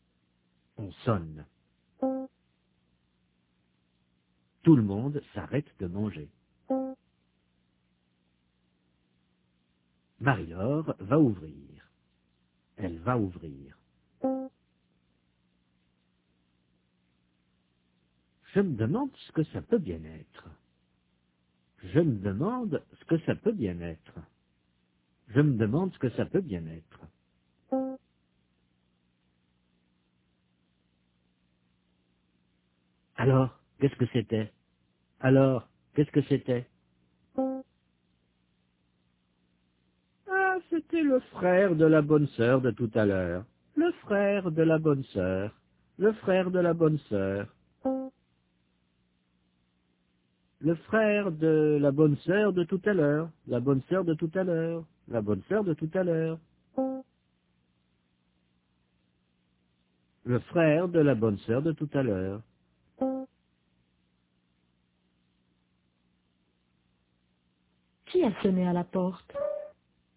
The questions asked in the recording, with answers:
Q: Qui a sonné à la porte?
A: Le frère de la bonne sœur.